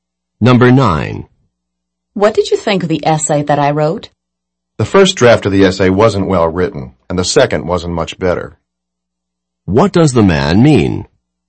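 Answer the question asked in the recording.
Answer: Both drafts were poorly written.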